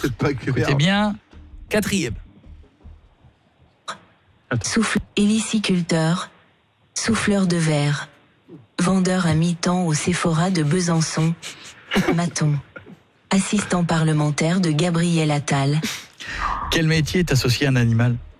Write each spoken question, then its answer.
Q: Quel métier est associé à un animal ?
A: Héliciculteur.